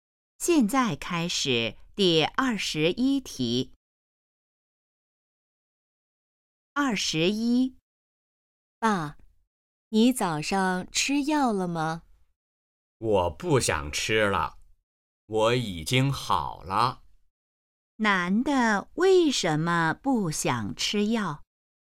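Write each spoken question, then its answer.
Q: 男的为什么不想吃药?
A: 他已经好了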